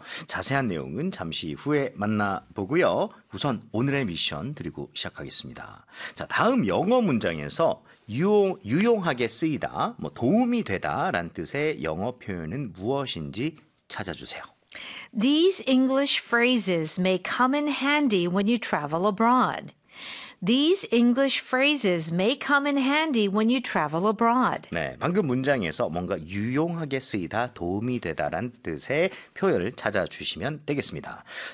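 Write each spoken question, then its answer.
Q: 자, 다음 영어 문장에서 유용하게 쓰이다, 뭐 도움이 되다란 뜻의 영어 표현은 무엇인지 찾아주세요.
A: come in handy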